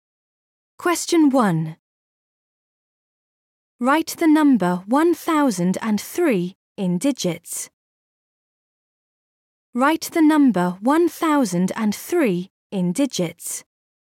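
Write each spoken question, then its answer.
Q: Write the number 1003 in digits.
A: 1003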